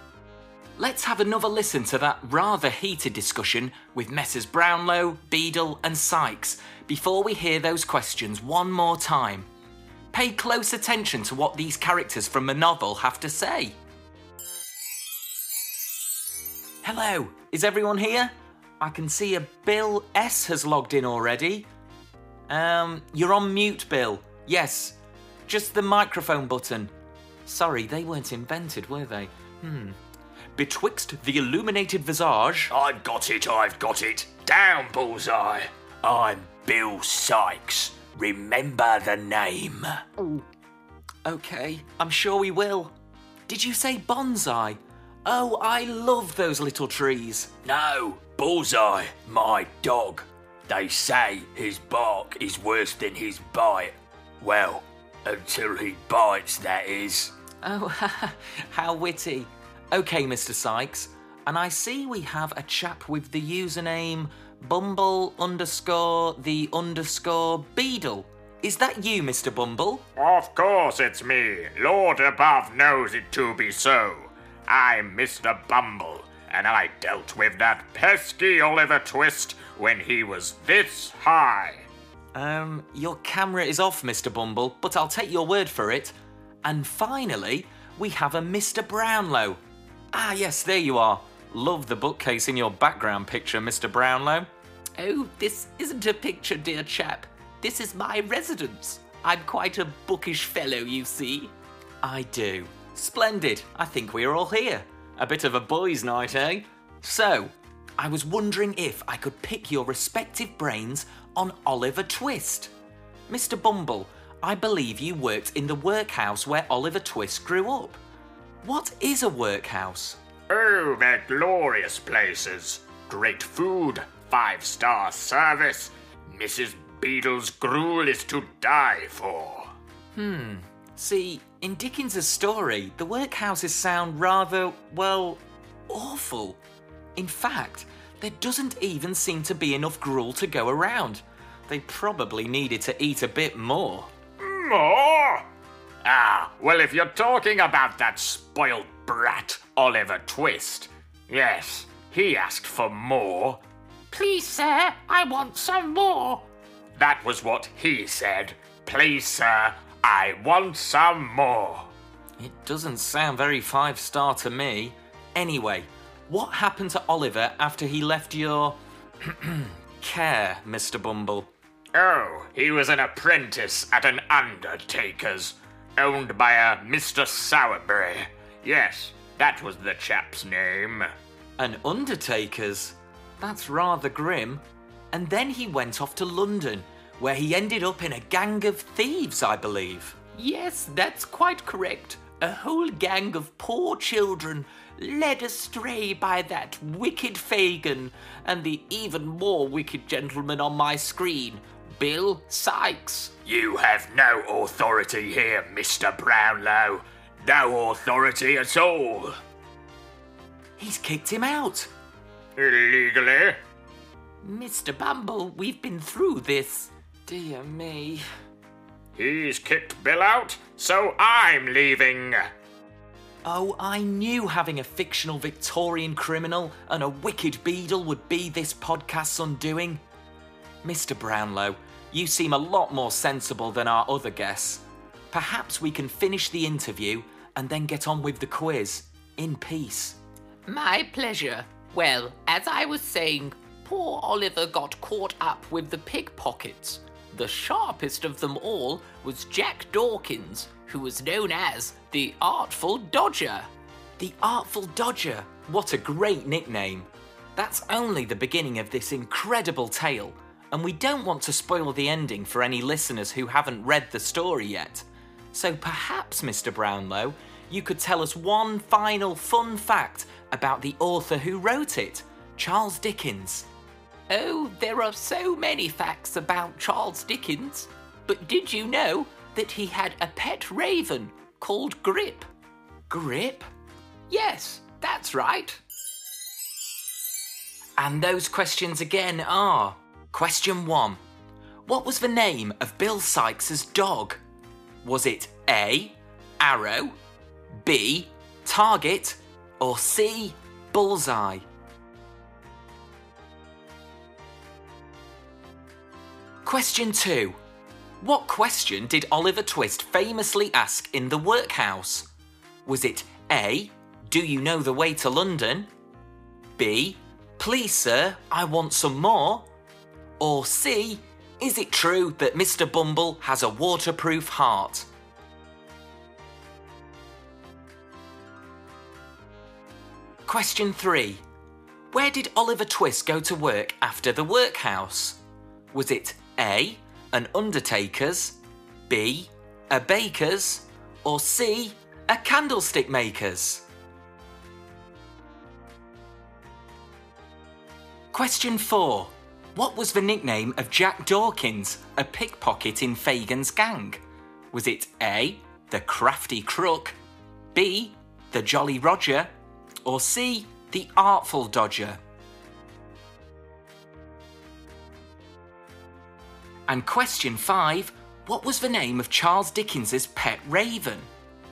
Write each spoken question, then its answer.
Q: What was the name of Bill Sykes's dog?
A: So the answer is C, Bullseye.

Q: What question did Oliver Twist famously ask in the workhouse?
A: the answer is B.

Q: Where did Oliver Twist go to work after the workhouse?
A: The answer is A. He becomes an apprentice to an undertaker.

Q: What was the nickname of Jack Dawkins, a pickpocket in Fagin's gang?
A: So the answer is C, the Artful Dodger.

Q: what was the name of Charles Dickens's pet raven?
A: Dickens was rather fond of his feathered friend called Grip